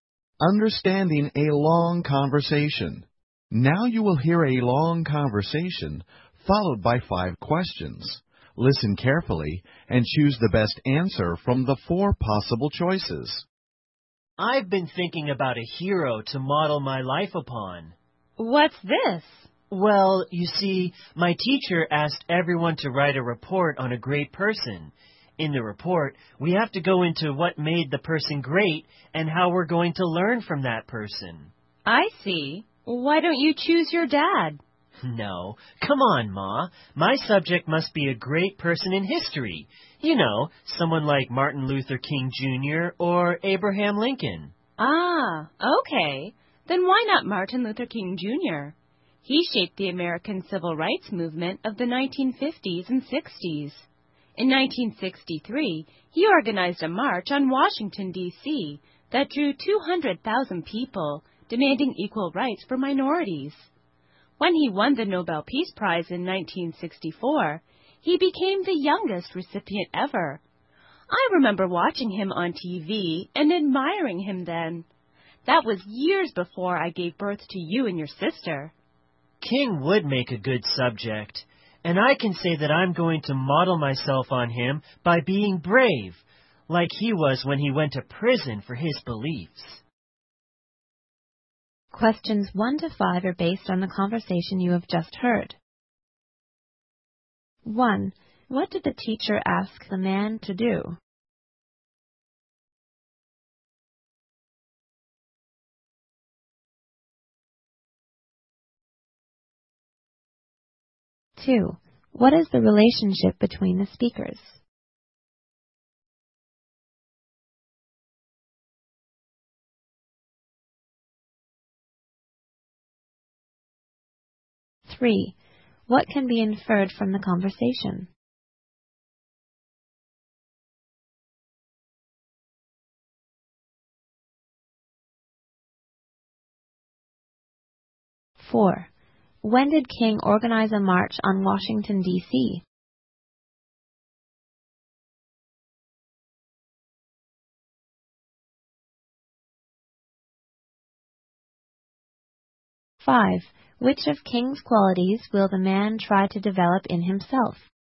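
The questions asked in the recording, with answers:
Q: What did the teacher ask the man to do?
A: Write a report on a great person

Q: What is the relationship between the speakers?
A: Mother and son

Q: When did King organize a march on Washington, D.C.?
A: In 1963

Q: Which of King's qualities will the man try to develop in himself?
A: Bravery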